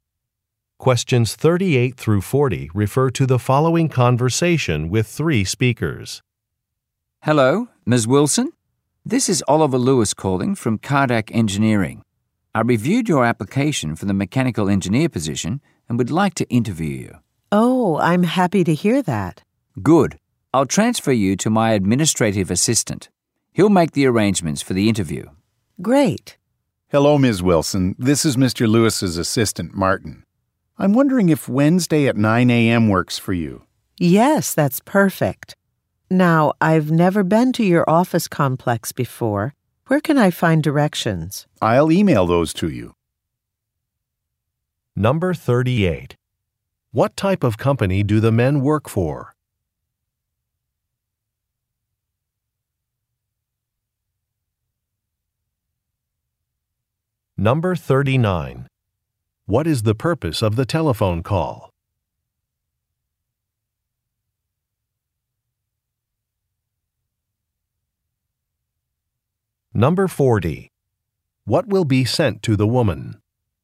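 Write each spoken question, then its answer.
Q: What type of company do the men work for?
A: An engineering company

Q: What is the purpose of the telephone call?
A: To arrange a job interview

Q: What will be sent to the woman?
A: Directions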